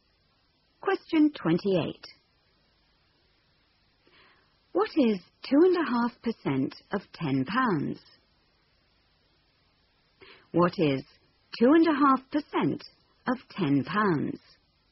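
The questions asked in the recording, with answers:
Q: What is 2.5% of £10?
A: 25p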